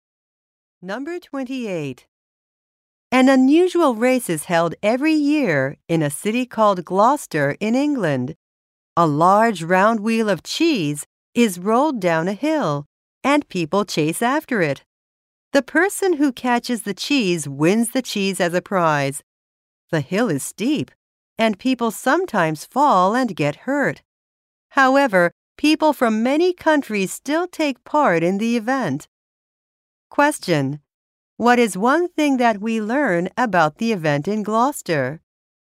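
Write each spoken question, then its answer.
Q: What is one thing that we learn about the event in Gloucester?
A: People from many countries take part even though it is dangerous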